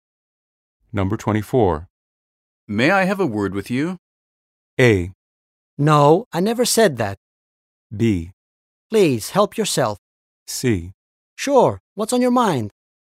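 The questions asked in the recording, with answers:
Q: May I have a word with you?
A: C: Sure, what's on your mind?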